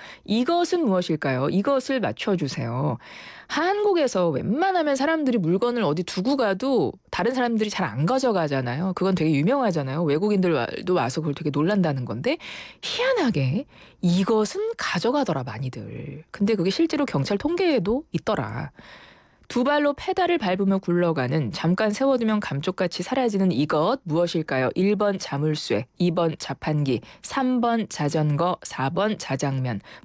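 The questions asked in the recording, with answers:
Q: 두 발로 페달을 밟으며 굴러가는 잠깐 세워두면 감쪽같이 사라지는 이것 무엇일까요?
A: 3: 자전거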